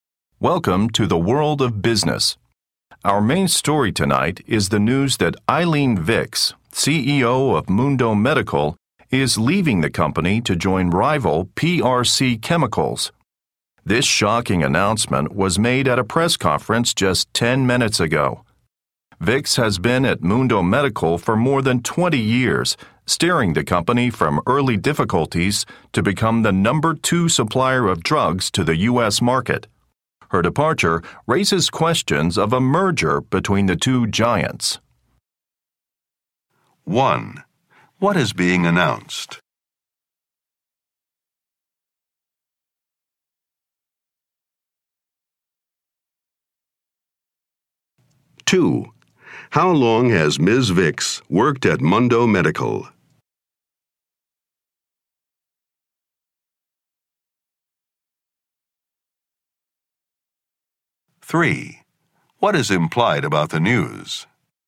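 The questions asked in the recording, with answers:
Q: What is being announced?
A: The CEO of Mundo Medical, Eileen Vicks, is leaving to join rival PRC Chemicals.

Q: How long has Ms. Vicks worked at Mundo Medical?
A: More than 20 years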